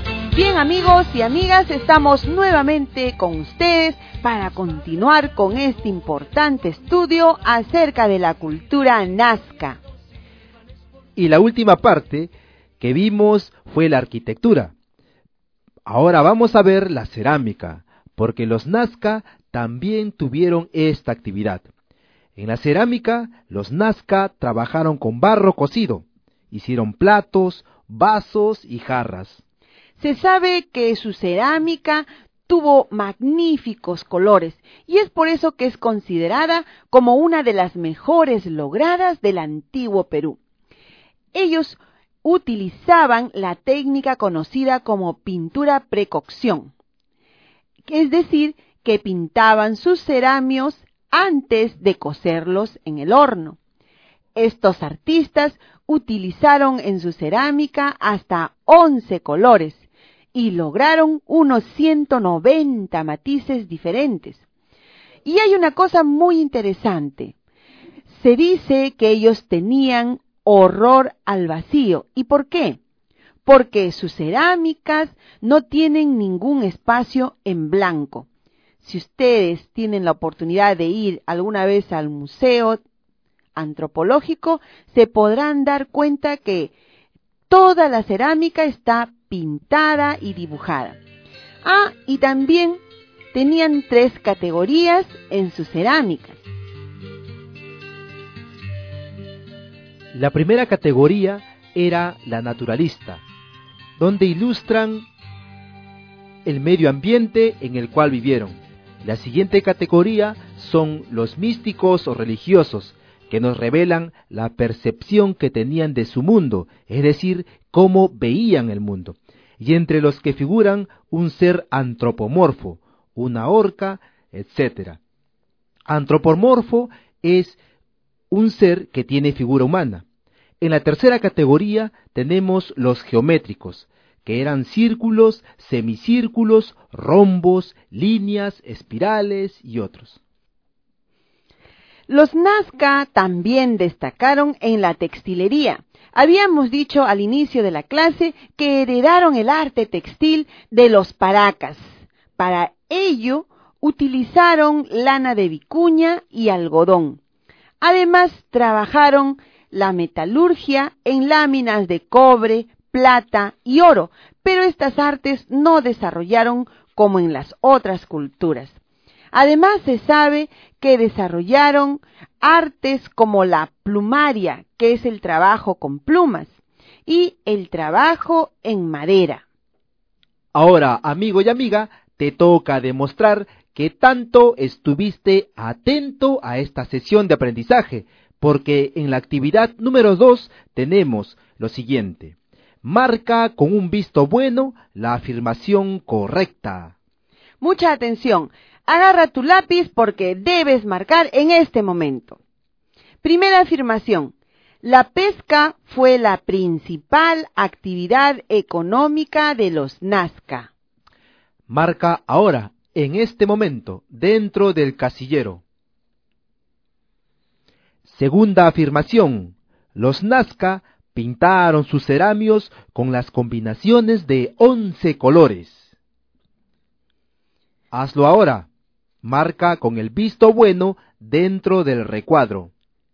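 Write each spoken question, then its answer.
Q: Segunda afirmación, los Nazca pintaron sus cerámicos con las combinaciones de 11 colores.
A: Correcta (verdadero)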